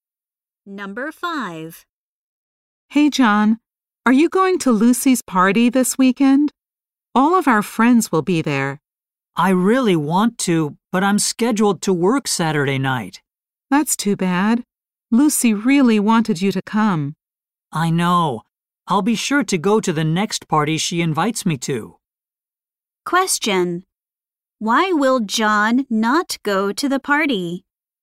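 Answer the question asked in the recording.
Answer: He has to work Saturday night.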